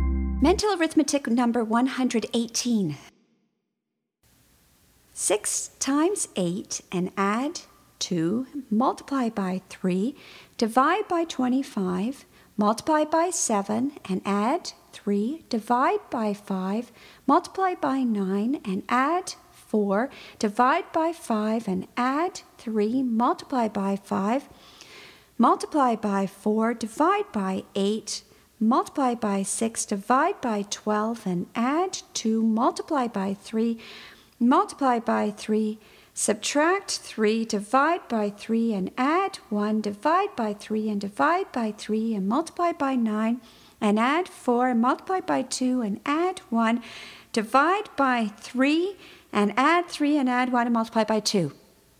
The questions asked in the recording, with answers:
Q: 6 times 8 and add 2, multiply by 3, divide by 25, multiply by 7 and add 3, divide by 5, multiply by 9 and add 4, divide by 5 and add 3, multiply by 5, multiply by 4, divide by 8, multiply by 6, divide by 12 and add 2, multiply by 3, multiply by 3, subtract 3, divide by 3 and add 1, divide by 3 and divide by 3 and multiply by 9 and add 4, and multiply by 2 and add 1, divide by 3 and add 3 and add 1 and multiply by 2.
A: And the answer is 122.